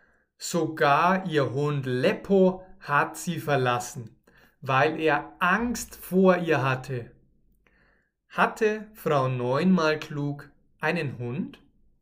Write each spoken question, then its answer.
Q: Hatte Frau Neunmal klug einen Hund?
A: Ja, sie hatte einen Hund.